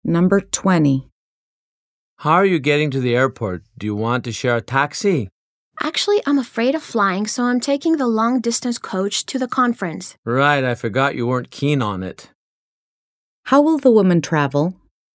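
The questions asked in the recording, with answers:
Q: How will the woman travel?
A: By long-distance coach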